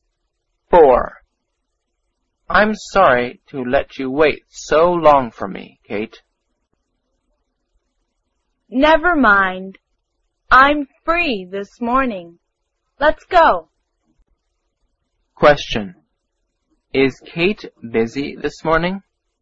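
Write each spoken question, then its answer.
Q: Is Kate busy this morning?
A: No, she is free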